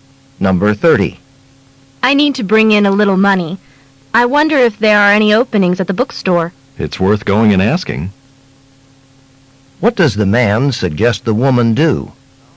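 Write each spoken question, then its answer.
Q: What does the man suggest the woman do?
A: Ask at the bookstore about jobs.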